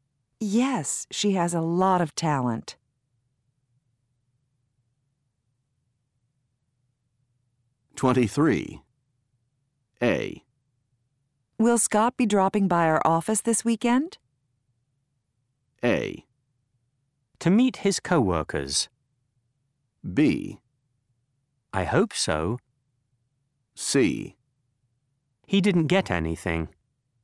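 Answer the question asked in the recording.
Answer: B: I hope so.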